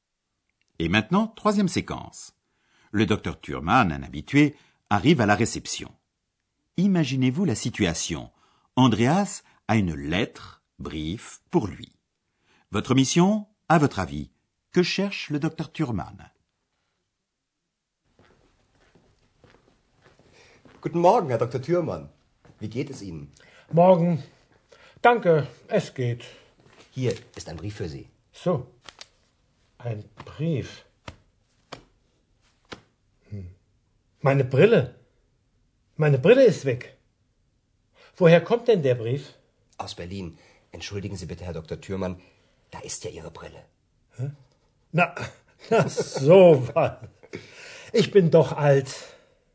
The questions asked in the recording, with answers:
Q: Votre mission, à votre avis, que cherche le docteur Thurman?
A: Mais pour cela, il a besoin de ses lunettes, brille, qu'il cherche sans trouver.